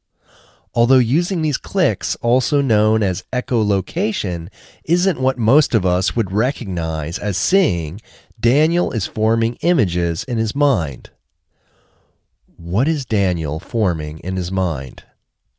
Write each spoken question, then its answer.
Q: What is Daniel forming in his mind?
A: Daniel is forming images in his mind.